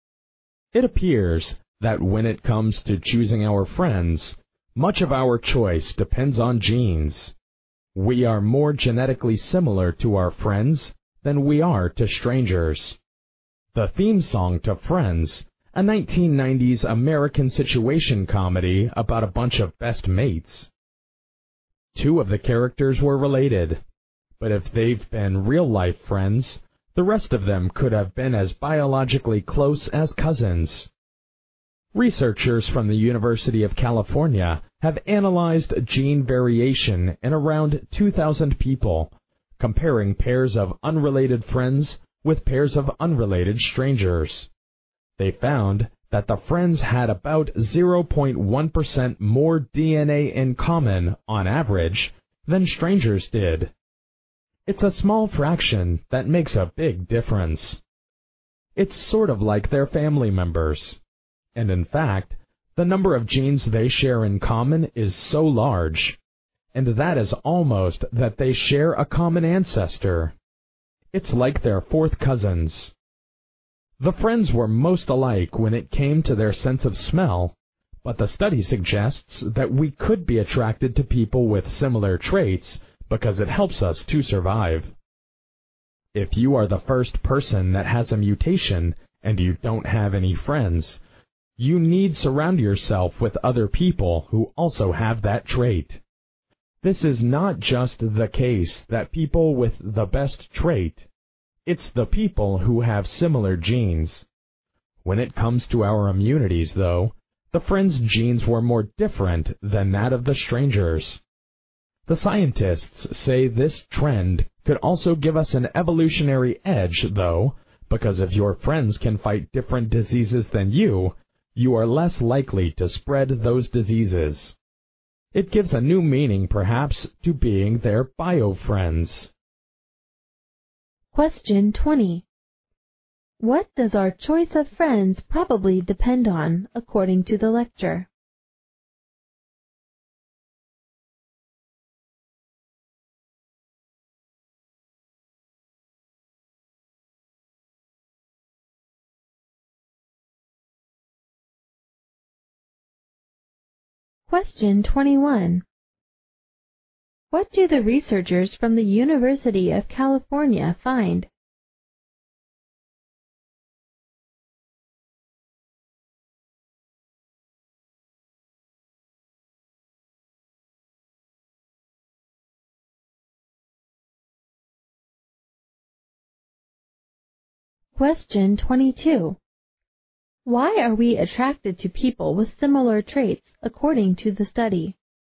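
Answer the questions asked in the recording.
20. Genes.
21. Friends share about 0.1% more DNA on average than strangers do.
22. Because it helps us to survive.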